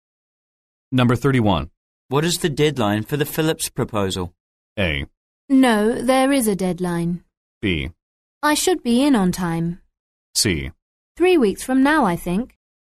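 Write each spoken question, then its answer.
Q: What is the deadline for the Phillips proposal?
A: C: 3 weeks from now, I think.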